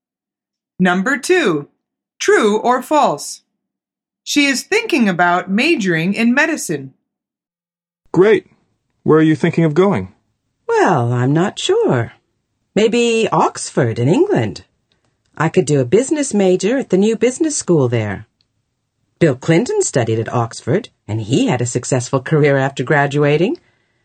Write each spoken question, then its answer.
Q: True or false? She is thinking about majoring in medicine.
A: The answer is false. She's thinking about studying business.